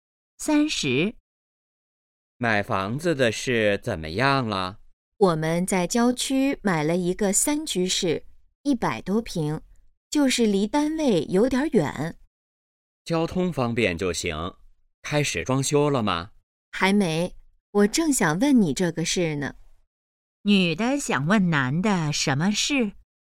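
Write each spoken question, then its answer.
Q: 女的想问男的什么事?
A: 装修的事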